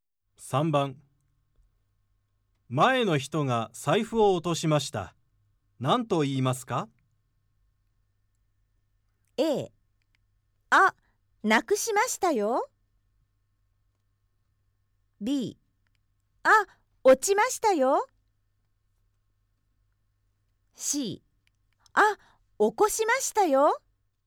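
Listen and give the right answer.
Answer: B: あ、落ちましたよ。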